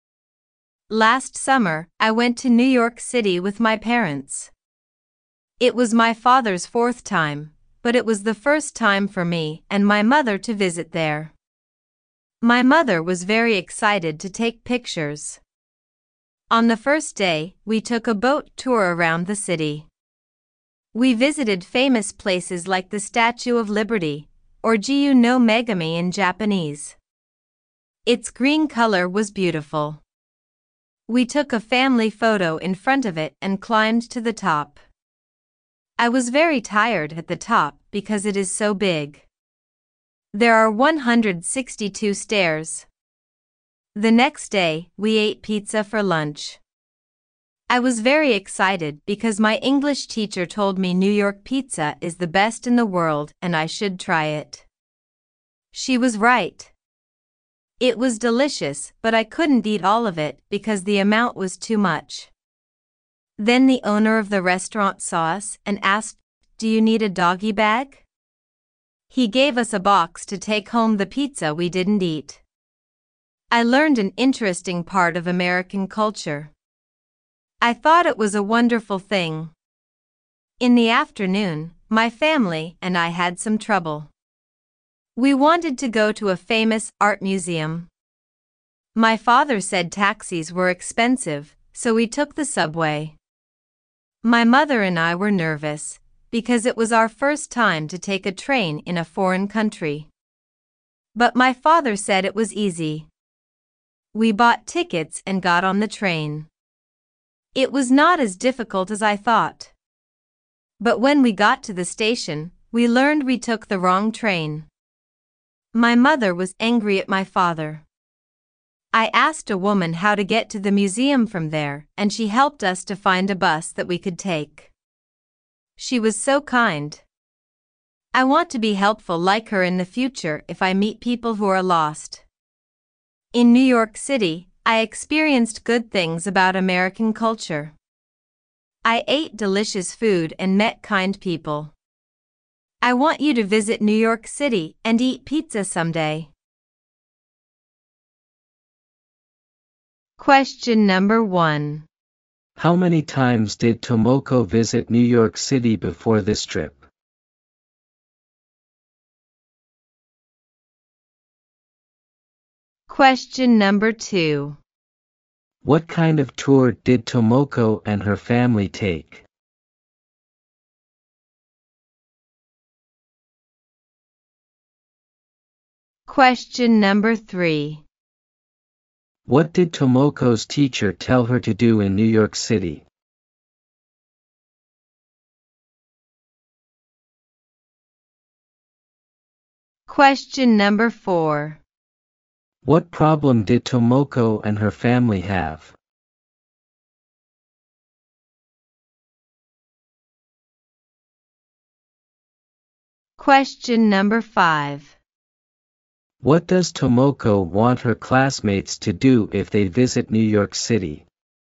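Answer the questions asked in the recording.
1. None; it was her first time
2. A boat tour around the city
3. Try New York pizza
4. They took the wrong train
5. Eat pizza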